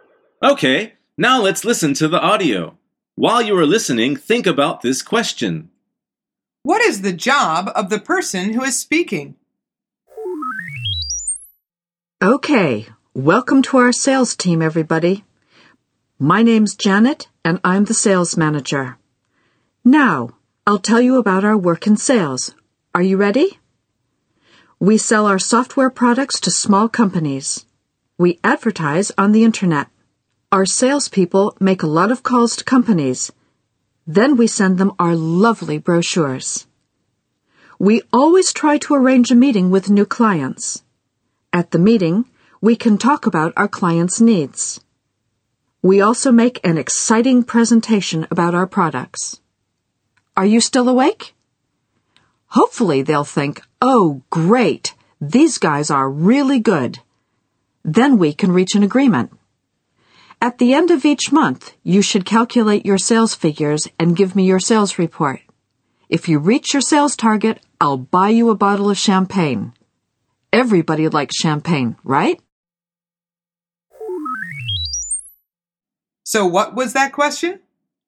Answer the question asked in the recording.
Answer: The answer is she is the sales manager.